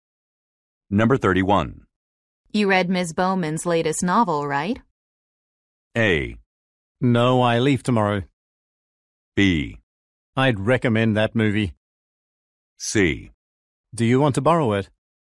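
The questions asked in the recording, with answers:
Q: You read Ms. Bowman's latest novel, right?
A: C: Do you want to borrow it?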